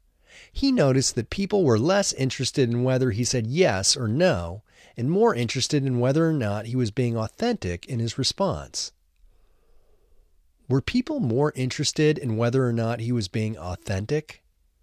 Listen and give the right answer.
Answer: Yes, people were more interested in whether or not he was being authentic.